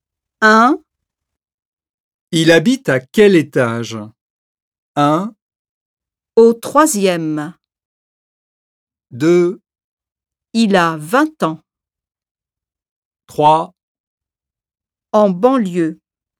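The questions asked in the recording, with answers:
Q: Il habite à quel étage?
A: 1: Au troisième.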